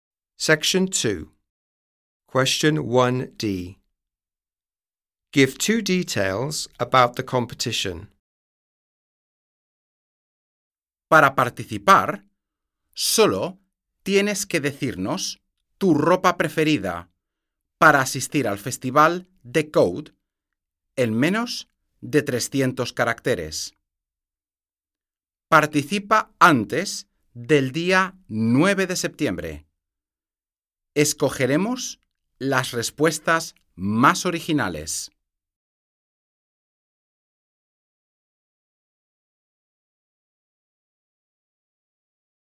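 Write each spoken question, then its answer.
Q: Give two details about the competition.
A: Say your favourite clothes for the festival in under 300 characters; enter before 9th September; most original answers chosen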